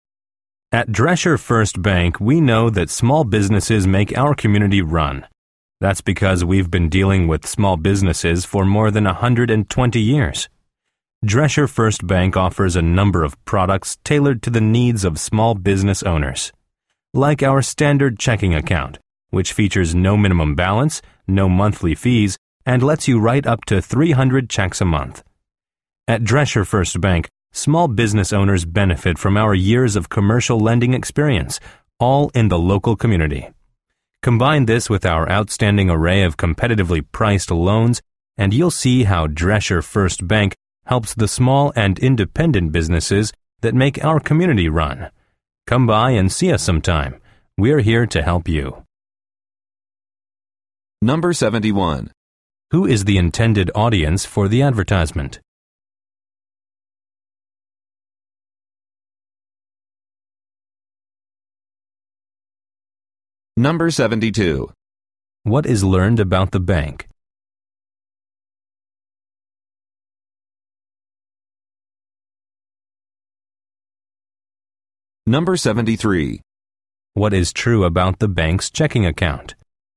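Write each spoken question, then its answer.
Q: Who is the intended audience for the advertisement?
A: Small business owners

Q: What is true about the bank's checking account?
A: It has no minimum balance and no monthly fees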